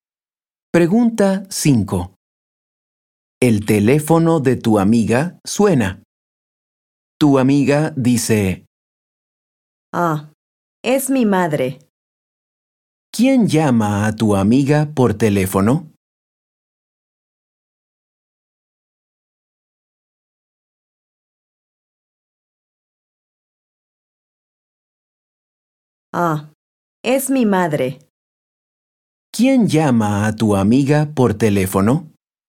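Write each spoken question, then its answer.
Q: ¿Quién llama a tu amiga por teléfono?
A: su madre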